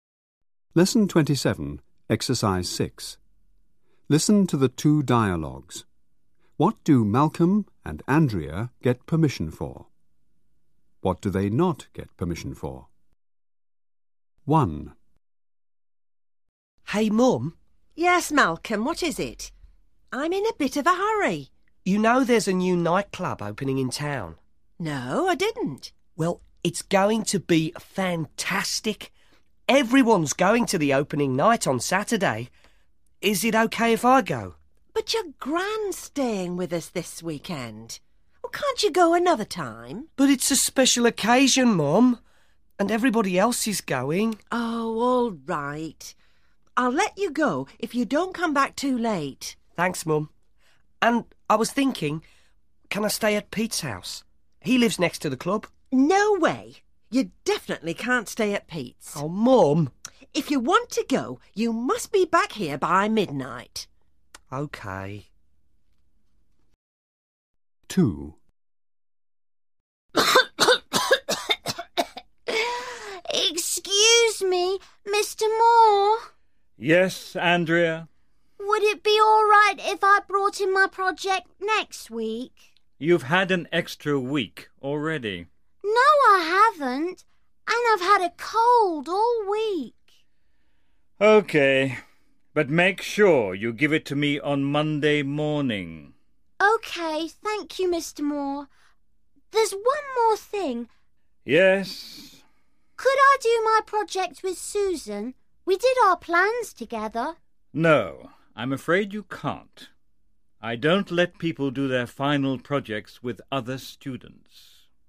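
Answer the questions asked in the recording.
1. Malcolm: to go to the new nightclub's opening night (if back by midnight); Andrea: to bring in her project later (on Monday morning)
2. Malcolm: to stay at Pete's house; Andrea: to do her project with Susan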